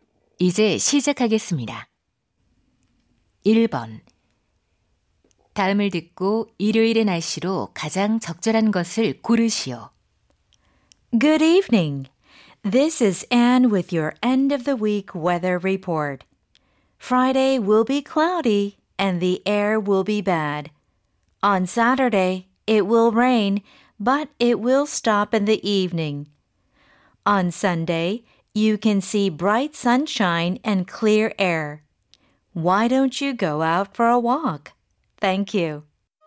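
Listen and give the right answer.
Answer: 맑고 공기가 깨끗함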